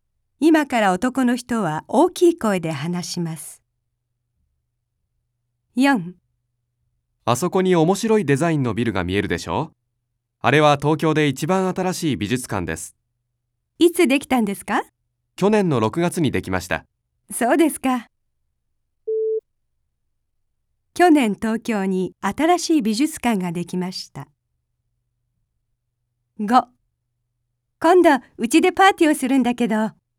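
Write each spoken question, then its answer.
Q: 去年東京に新しい美術館ができました。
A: ○(正しい)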